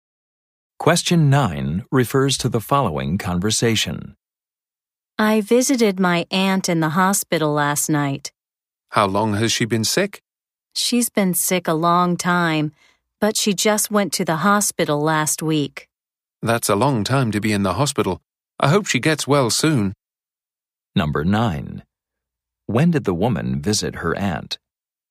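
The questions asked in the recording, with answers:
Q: When did the woman visit her aunt?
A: Last night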